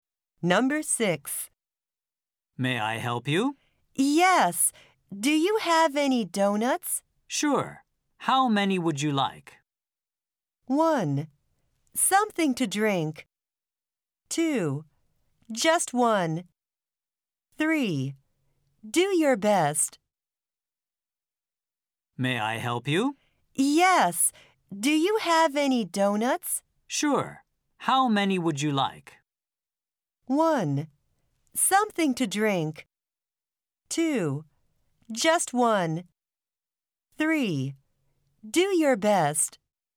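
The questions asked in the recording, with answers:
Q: Sure. How many would you like?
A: 2: Just one.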